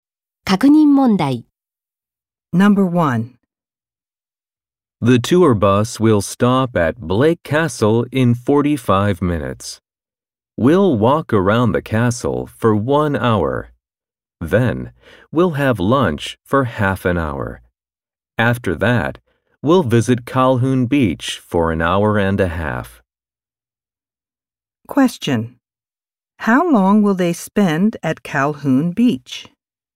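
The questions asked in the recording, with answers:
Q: How long will they spend at Calhoun Beach?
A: An hour and a half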